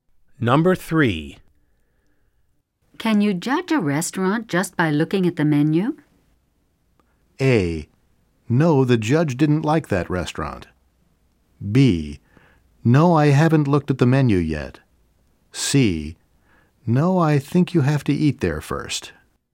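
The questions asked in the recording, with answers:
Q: Can you judge a restaurant just by looking at the menu?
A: C: No, I think you have to eat there first.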